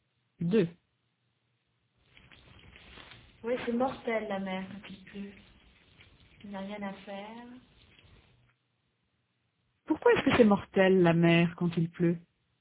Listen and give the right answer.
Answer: 'Parce qu'il n'y a rien à faire.